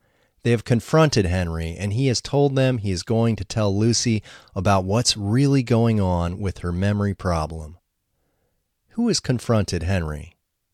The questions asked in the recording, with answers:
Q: Who has confronted Henry?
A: Lucy's father and brother have confronted Henry.